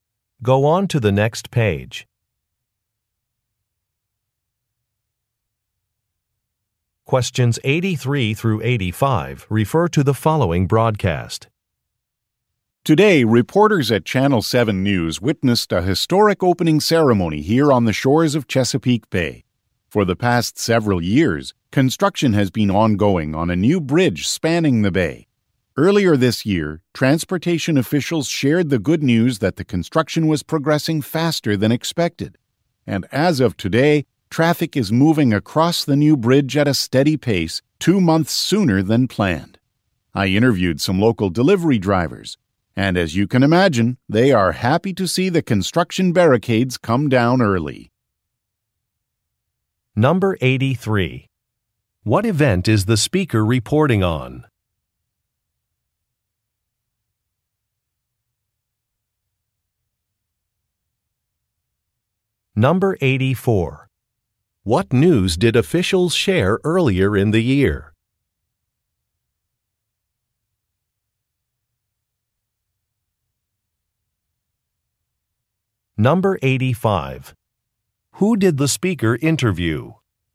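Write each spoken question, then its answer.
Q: What event is the speaker reporting on?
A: The opening of a new bridge

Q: What news did officials share earlier in the year?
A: Construction was progressing faster than expected

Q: Who did the speaker interview?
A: Local delivery drivers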